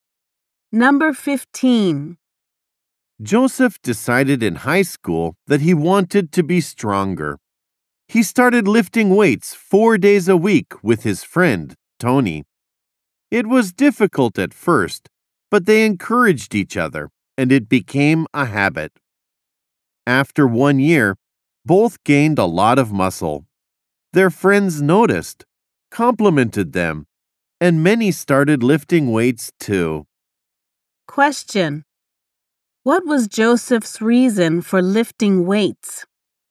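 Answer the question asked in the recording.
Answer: He wanted to be stronger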